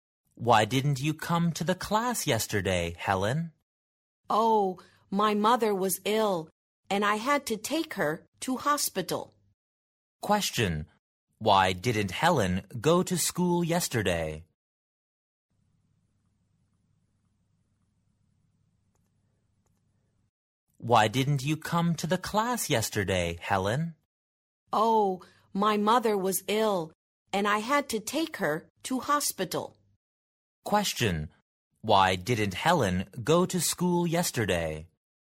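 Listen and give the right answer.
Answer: Her mother was ill and she had to take her to hospital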